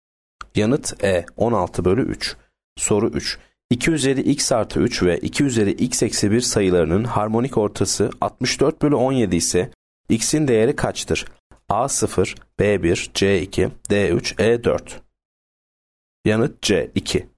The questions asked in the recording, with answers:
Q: 2 üzeri x artı 3 ve 2 üzeri x eksi 1 sayılarının harmonik ortası 64 bölü 17 ise x'in değeri kaçtır?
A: Yanıt C 2.